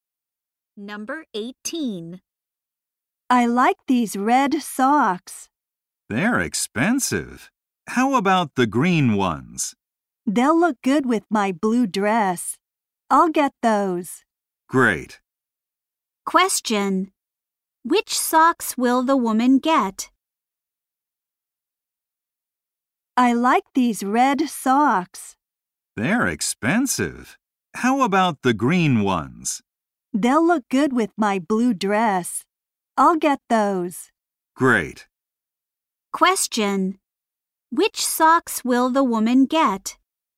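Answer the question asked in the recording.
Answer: The green ones.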